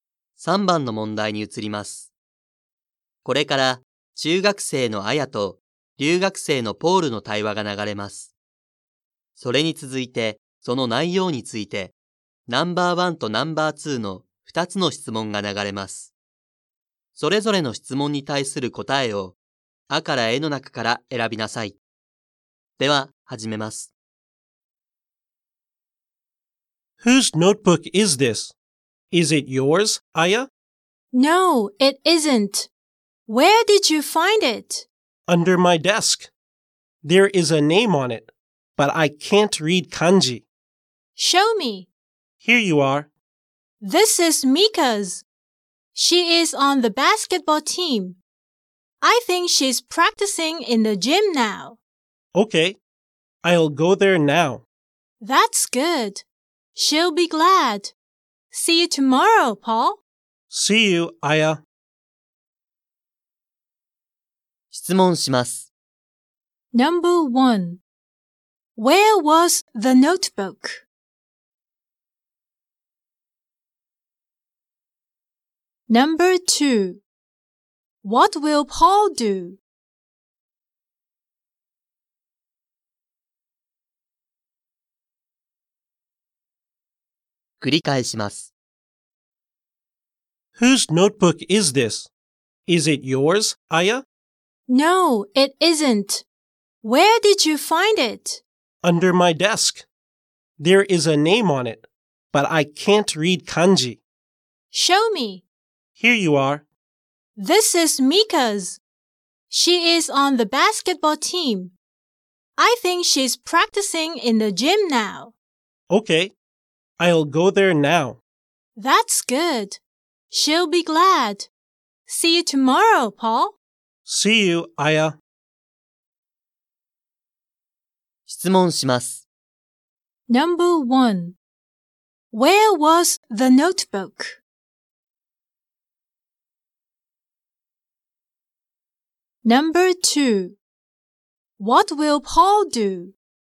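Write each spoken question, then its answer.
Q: Where was the notebook?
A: Under Paul's desk.

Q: What will Paul do?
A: He will go to the gym to give the notebook to Mika.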